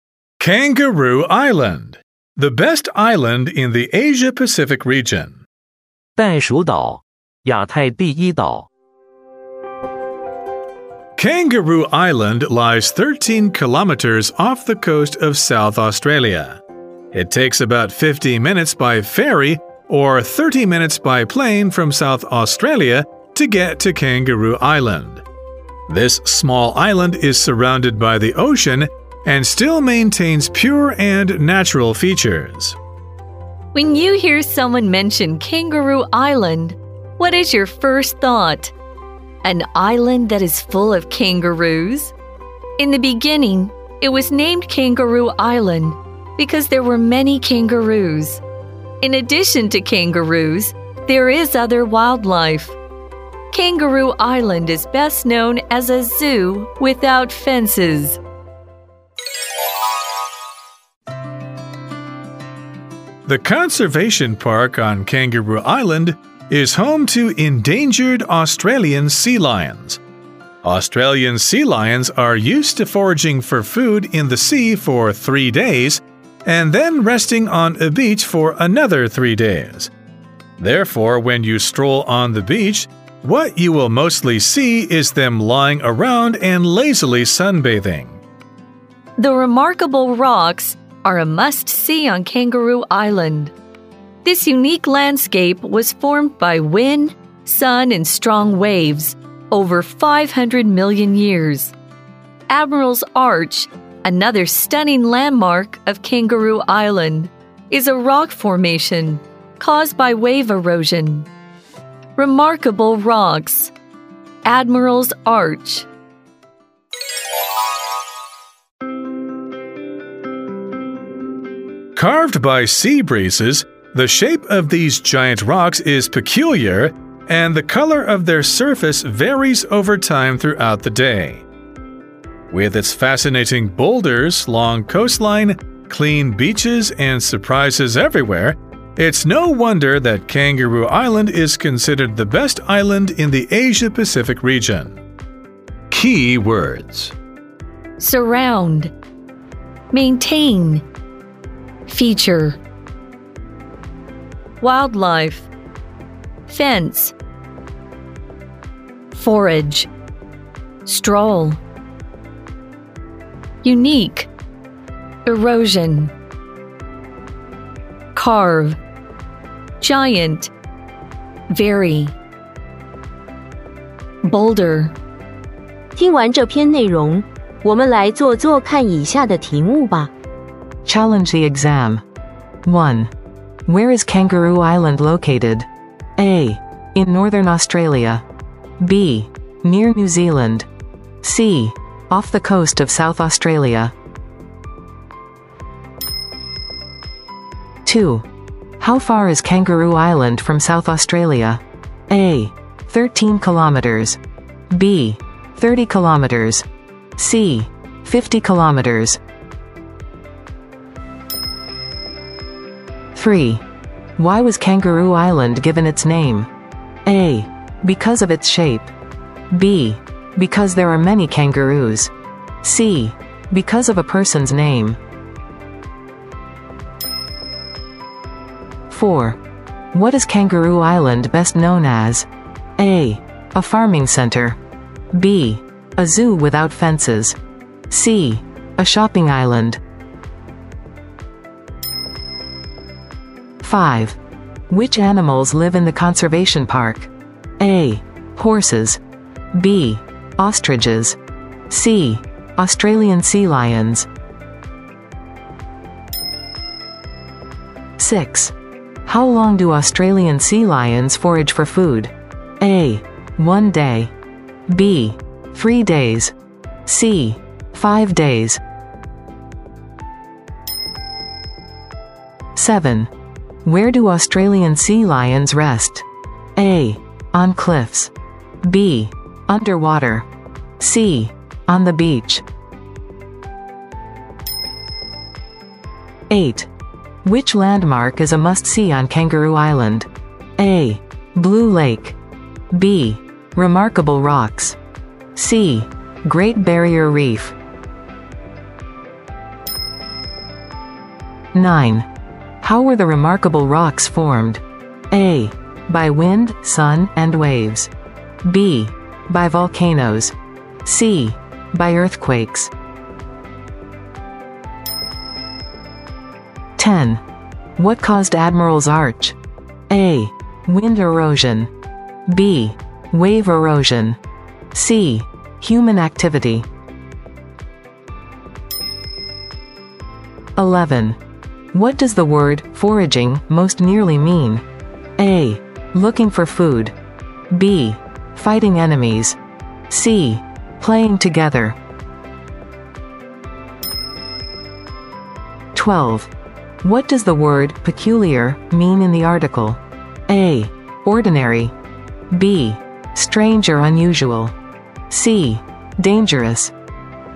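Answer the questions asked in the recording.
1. C: Off the coast of South Australia
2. A: 13 kilometers
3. B: Because there are many kangaroos
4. B: A zoo without fences
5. C: Australian sea lions
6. B: 3 days
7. C: On the beach
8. B: Remarkable Rocks
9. A: By wind, sun, and waves
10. B: Wave erosion
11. A: Looking for food
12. B: Strange or unusual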